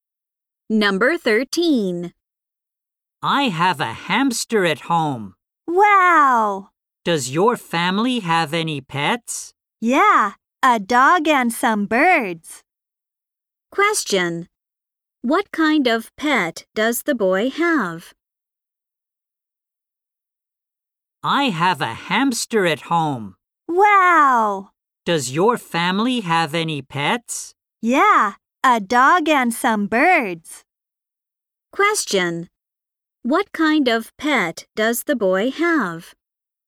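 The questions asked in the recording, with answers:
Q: What kind of pet does the boy have?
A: A hamster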